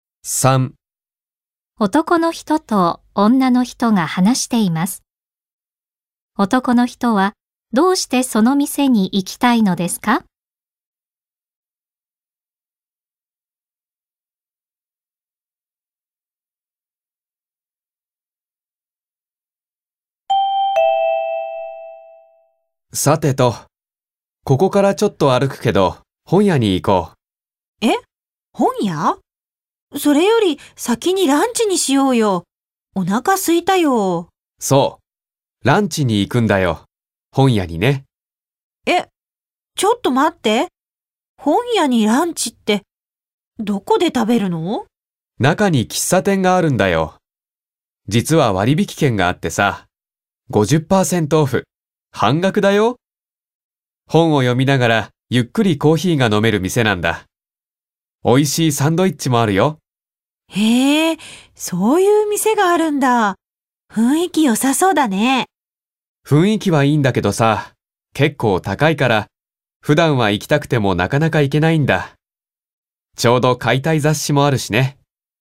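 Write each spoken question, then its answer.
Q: 男の人はどうしてその店に行きたいのですか?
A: 割引券があって半額で食べられるから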